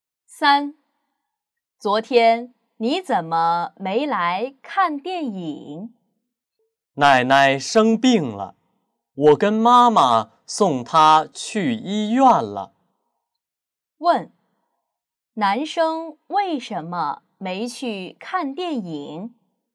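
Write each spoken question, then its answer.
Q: 男生为什么没去看电影?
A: 奶奶生病了,他送奶奶去医院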